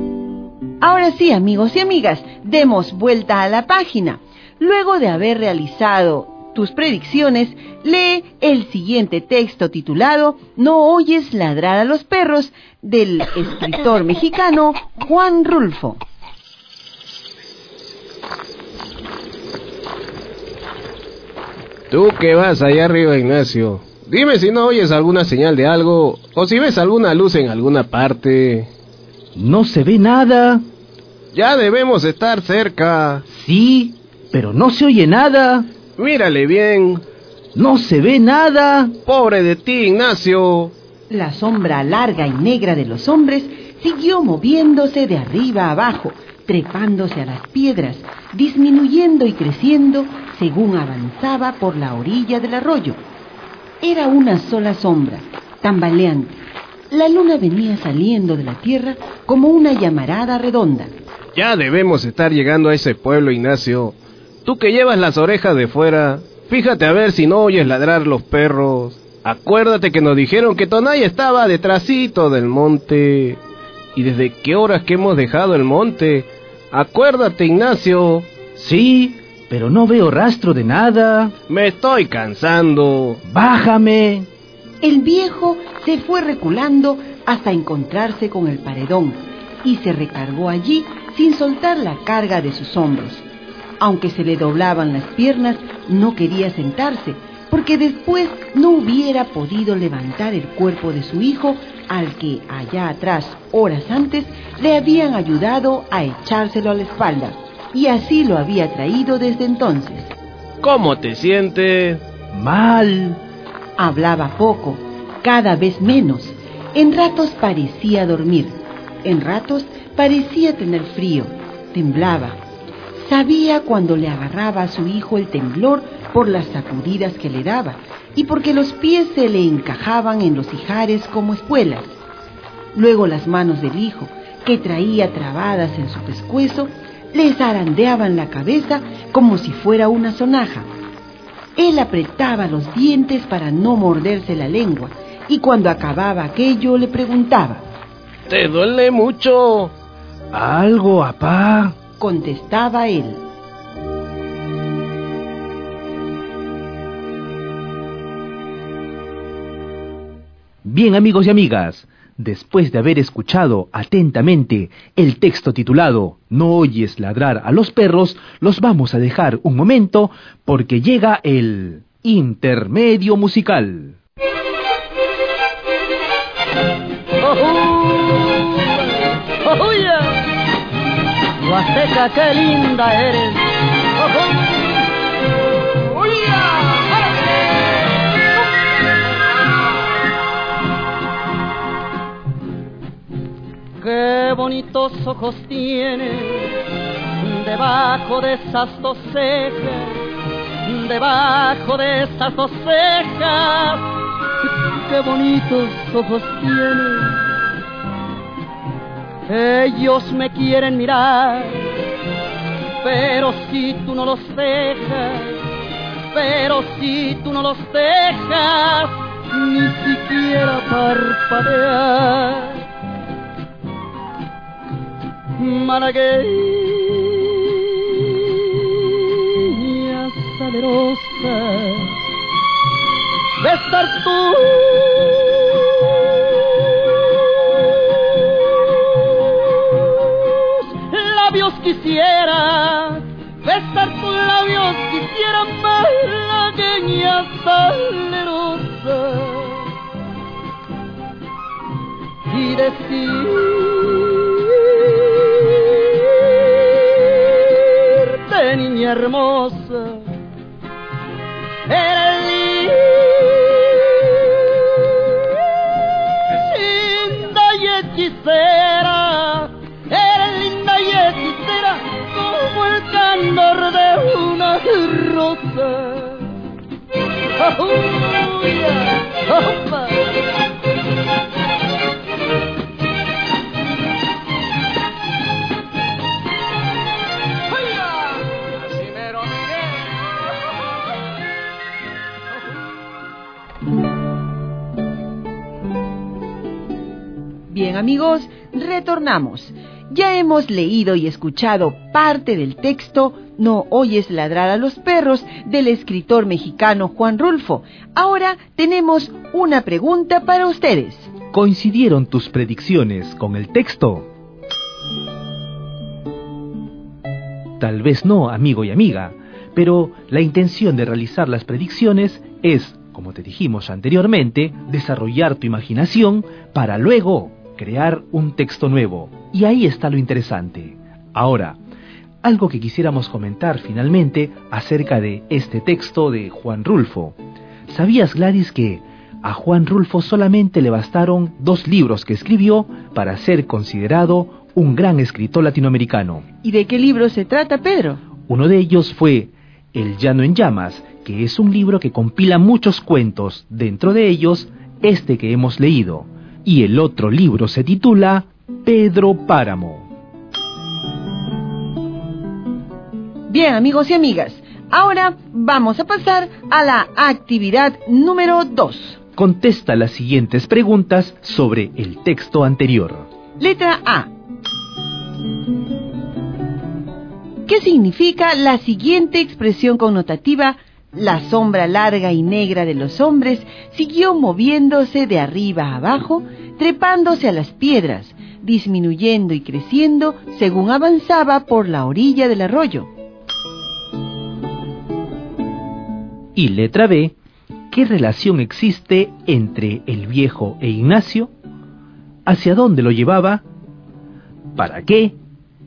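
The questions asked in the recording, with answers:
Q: ¿qué relación existe entre el viejo e Ignacio?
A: Son padre e hijo

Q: ¿Hacia dónde lo llevaba?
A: A un pueblo, Tonaya, detrás del monte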